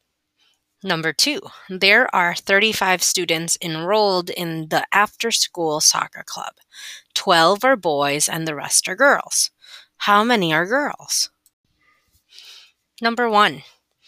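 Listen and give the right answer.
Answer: 23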